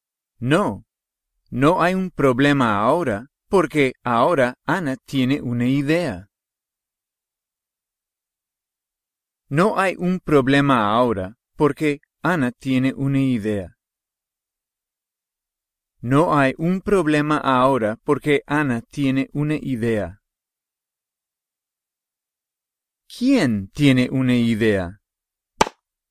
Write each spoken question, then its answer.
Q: ¿Quién tiene una idea?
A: Ana.